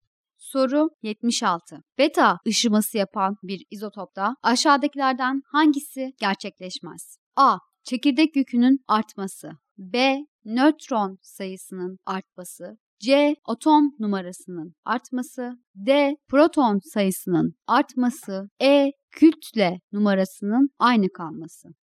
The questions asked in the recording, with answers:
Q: Beta ışıması yapan bir izotopta aşağıdakilerden hangisi gerçekleşmez?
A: Doğru cevap B şıkkı.